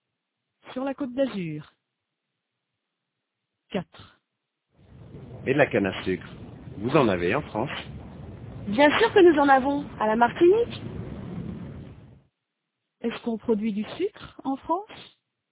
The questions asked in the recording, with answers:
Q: Est-ce qu'on produit du sucre en France?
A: Oui, à la Martinique.